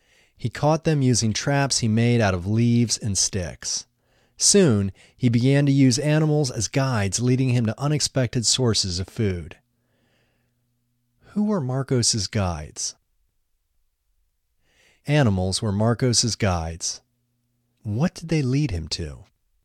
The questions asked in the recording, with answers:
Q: What did they lead him to?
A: They led him to unexpected sources of food.